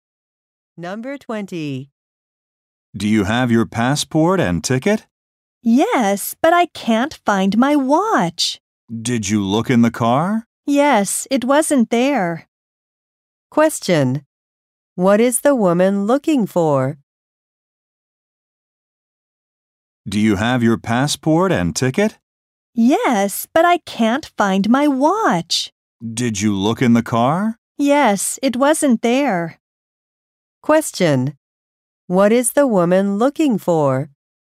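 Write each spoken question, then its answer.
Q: What is the woman looking for?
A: Her watch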